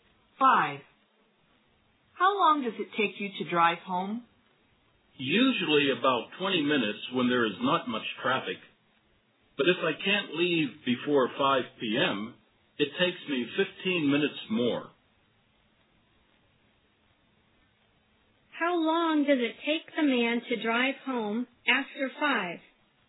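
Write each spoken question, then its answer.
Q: How long does it take the man to drive home after 5?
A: About 35 minutes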